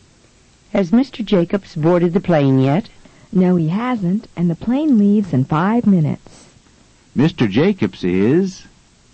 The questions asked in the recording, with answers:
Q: Mr. Jacobs is?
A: Mr. Jacobs is late.